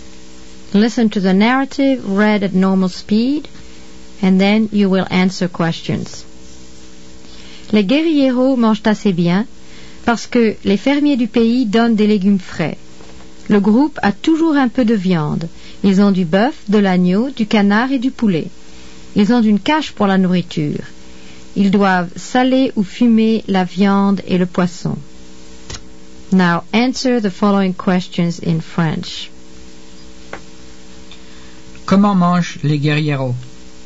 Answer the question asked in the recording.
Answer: Les guerrieros mangent bien, or ils mangent bien.